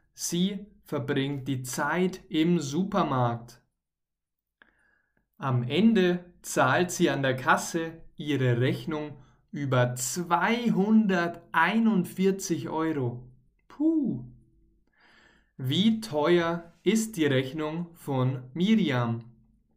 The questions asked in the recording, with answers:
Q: Wie teuer ist die Rechnung von Miriam?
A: €241. Ihre Rechnung beträgt 241 Euro.